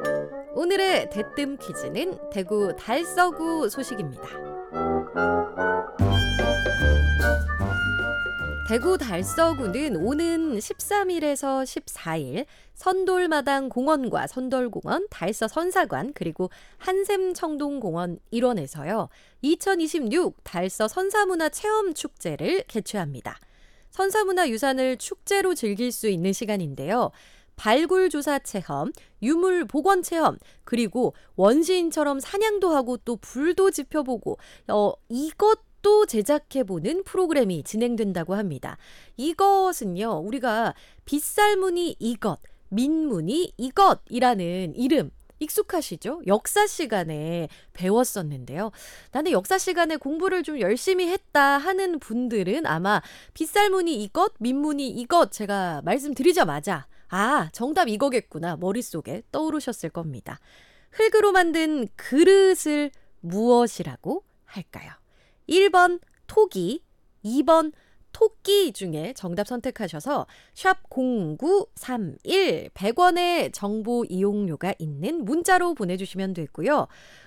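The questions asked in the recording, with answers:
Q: 흙으로 만든 그릇을 무엇이라고 할까요? 1번 토기, 2번 토끼 중에 정답 선택하셔서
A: 1: 토기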